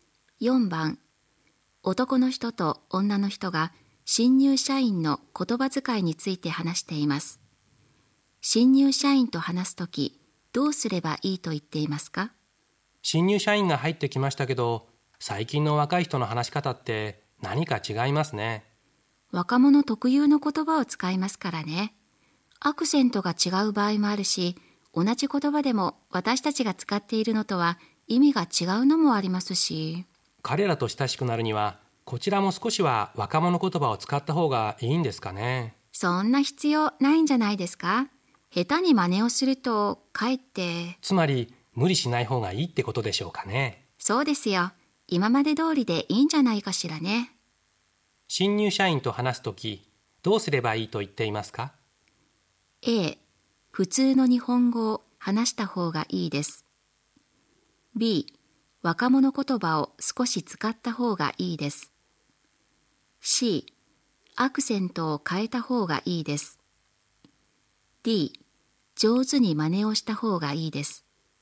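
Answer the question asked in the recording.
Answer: A: 普通の日本語を話した方がいいです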